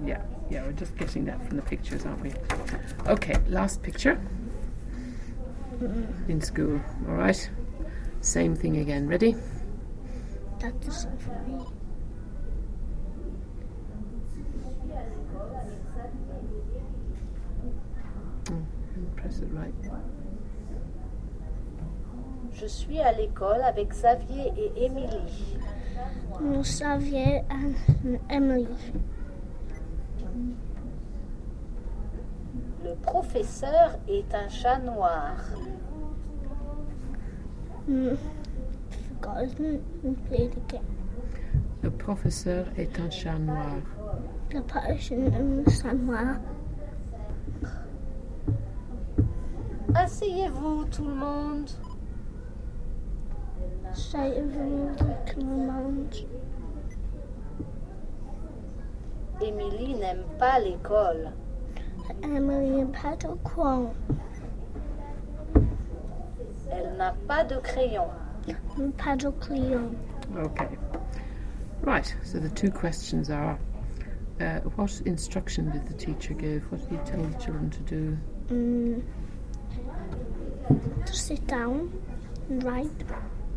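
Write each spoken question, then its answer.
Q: what instruction did the teacher give?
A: Sit down, everyone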